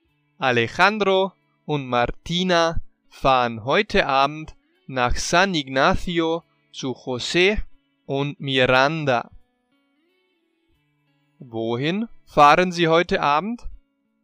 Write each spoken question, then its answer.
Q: Wohin fahren Sie heute Abend?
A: Nach San Ignacio zu José und Miranda.